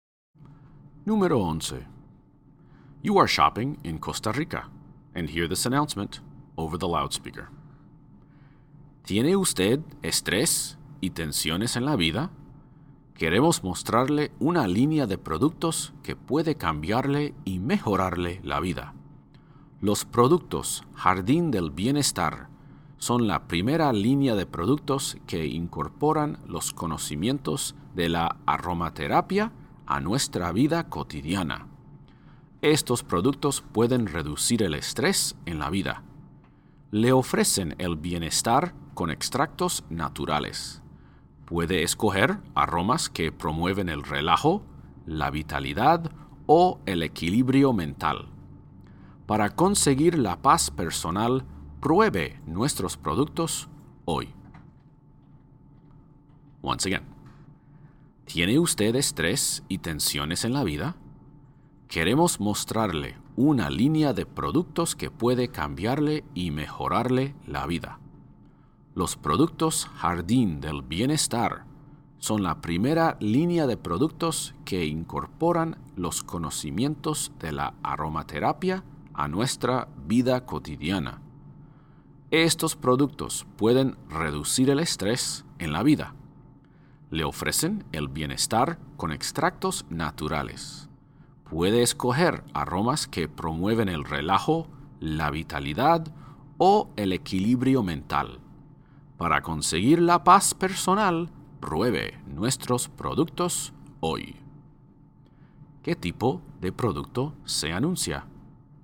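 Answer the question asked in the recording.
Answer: Productos de aromaterapia para reducir el estrés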